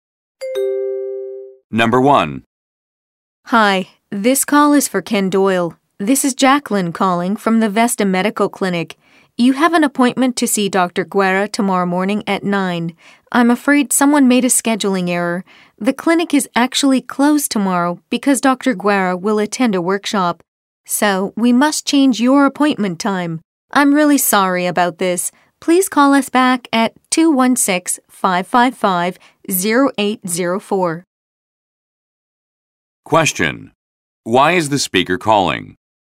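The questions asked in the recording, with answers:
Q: Why is the speaker calling?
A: To change Ken Doyle's appointment, because the clinic will be closed tomorrow.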